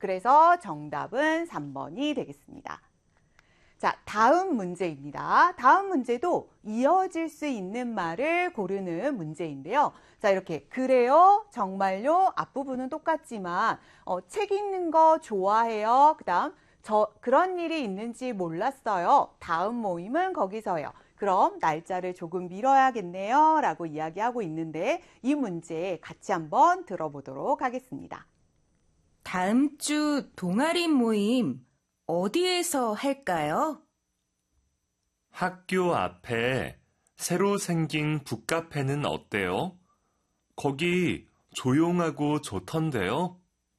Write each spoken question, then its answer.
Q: 다음 문제도 이어질 수 있는 말을 고르는 문제인데요.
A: 그럼 다음 모임은 거기서 해요.